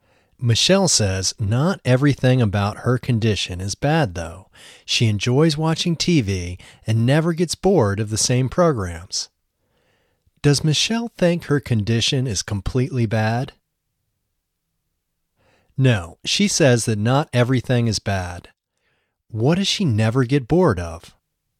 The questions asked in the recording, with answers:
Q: What does she never get bored of?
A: She never gets bored of watching the same TV programs.